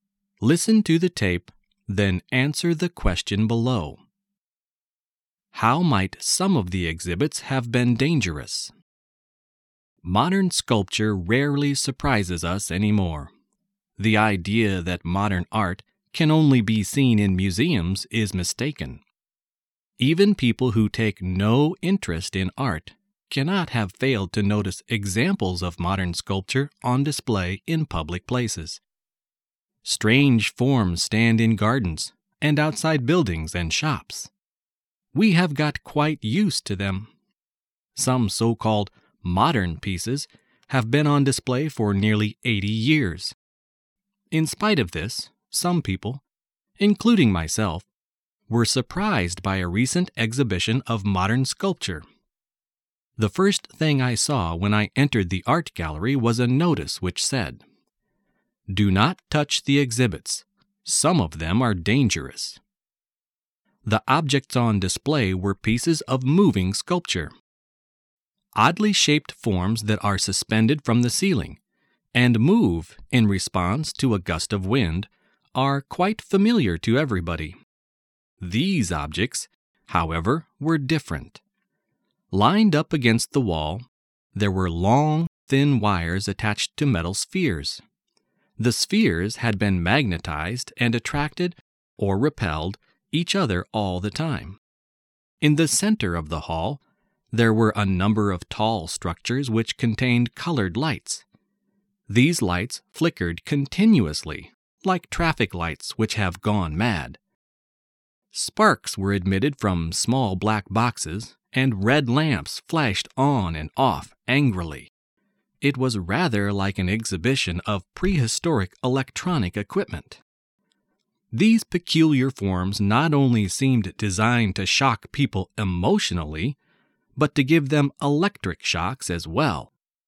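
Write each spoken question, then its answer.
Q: How might some of the exhibits have been dangerous?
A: They could give people electric shocks.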